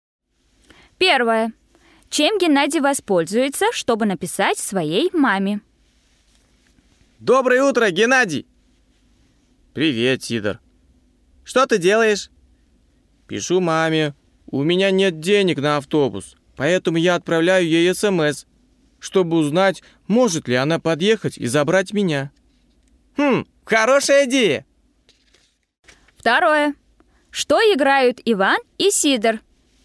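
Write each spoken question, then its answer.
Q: Чем Геннадий воспользуется, чтобы написать своей маме?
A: смс (телефоном)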